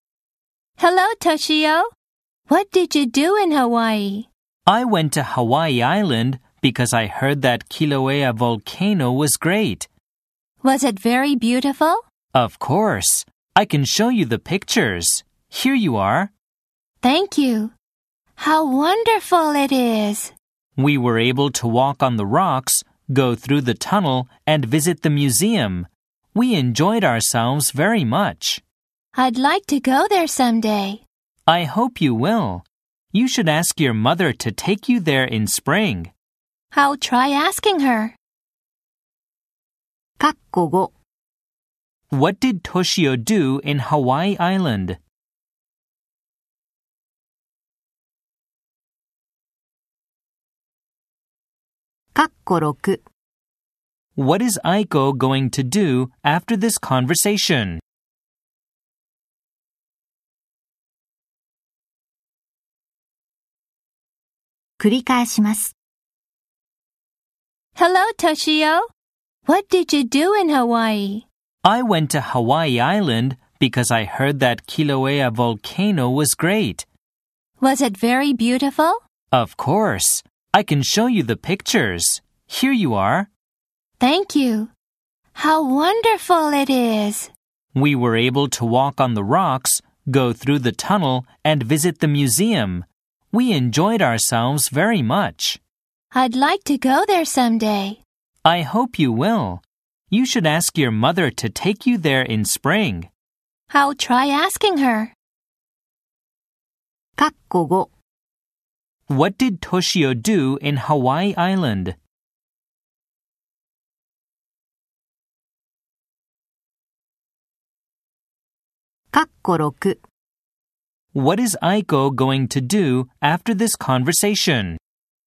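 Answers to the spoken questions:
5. He walked on the rocks, went through the tunnel, and visited the museum near Kilauea volcano.
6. Ask her mother to take her to Hawaii in spring.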